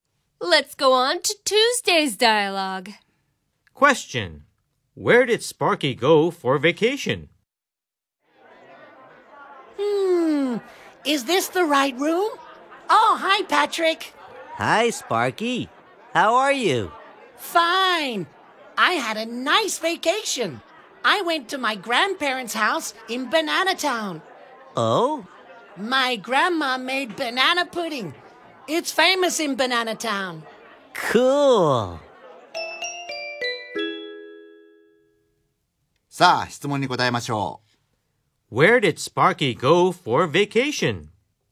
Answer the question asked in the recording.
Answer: He went to his grandparents' house in Banana Town.